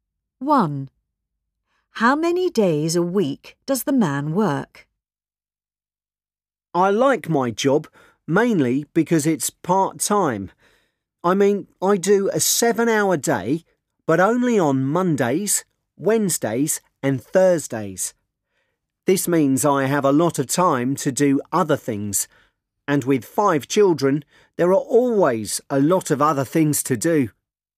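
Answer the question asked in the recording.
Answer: Three days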